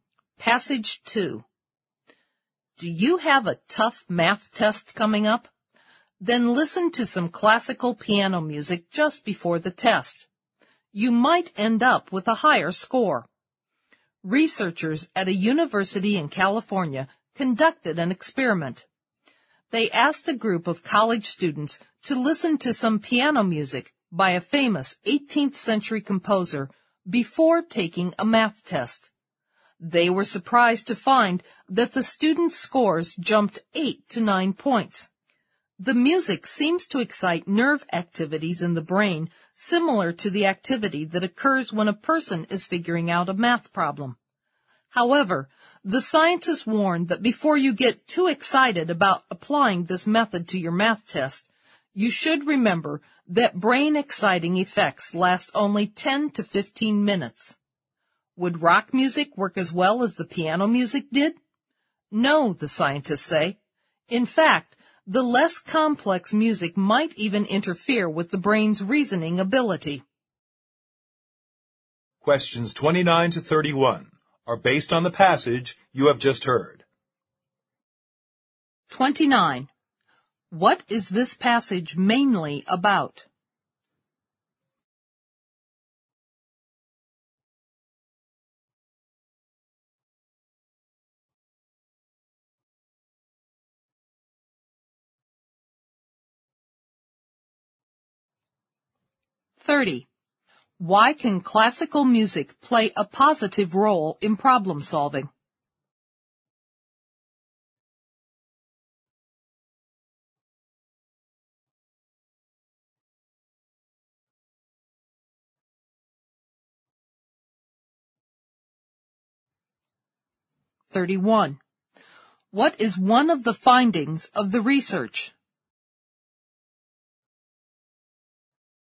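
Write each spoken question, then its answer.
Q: What is this passage mainly about?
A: Listening to classical piano music before a math test may improve scores

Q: Why can classical music play a positive role in problem solving?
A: It excites nerve activity in the brain similar to that when solving a math problem

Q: What is one of the findings of the research?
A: Students' math scores rose 8 to 9 points after listening to the piano music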